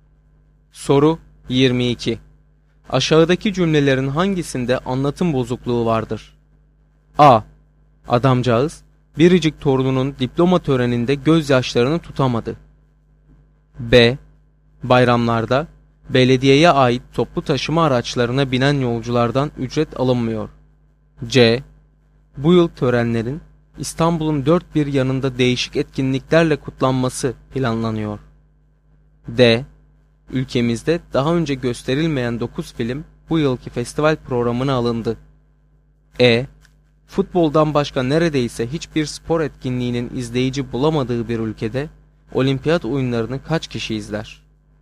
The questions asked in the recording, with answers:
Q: Aşağıdaki cümlelerin hangisinde anlatım bozukluğu vardır?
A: Doğru cevap C şıkkı.